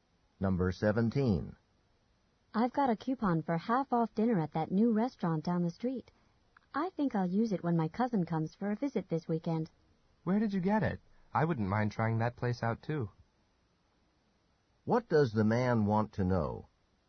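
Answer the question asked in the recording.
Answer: Where the woman got the coupon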